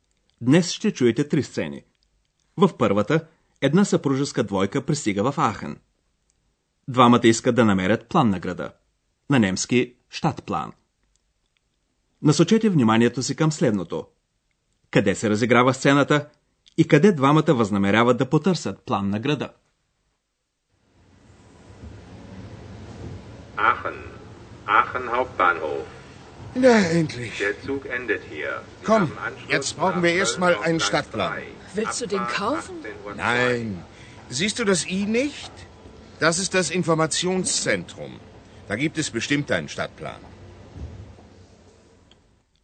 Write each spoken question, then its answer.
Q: Къде се разиграва сцената и къде двамата възнамеряват да потърсят план на града?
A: От съобщенията по високоговорителите сигурно разбрахте, че сцената се разиграва на главната гара на град Ахен.